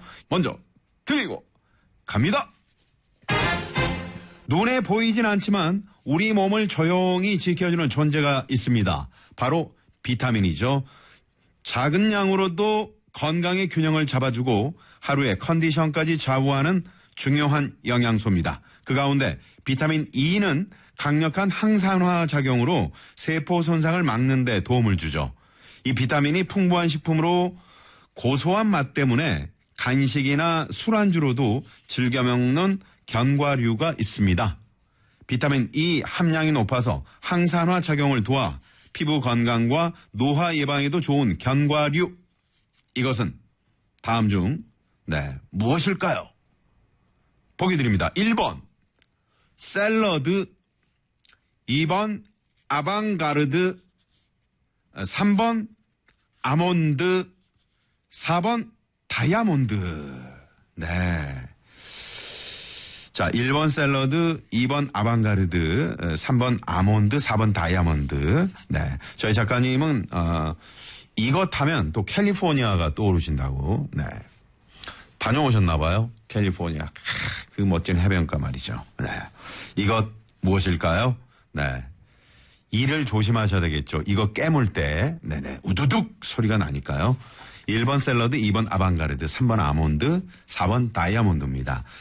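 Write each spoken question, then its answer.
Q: 이것은 다음 중 네, 무엇일까요?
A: 3: 아몬드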